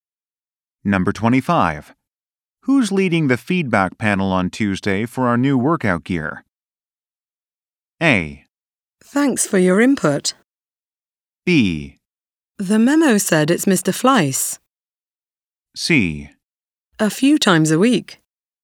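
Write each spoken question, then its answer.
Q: Who's leading the feedback panel on Tuesday for our new workout gear?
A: B: The memo said it's Mr. Fleiss.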